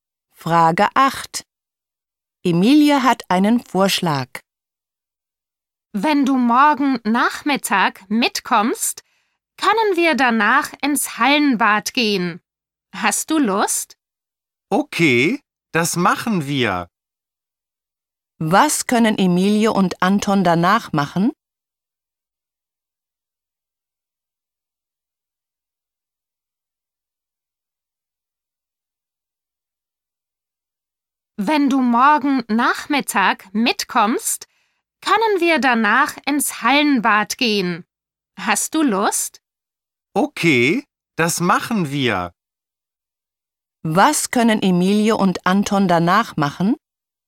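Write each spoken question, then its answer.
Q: Was können Emilie und Anton danach machen?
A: Ins Hallenbad gehen (schwimmen)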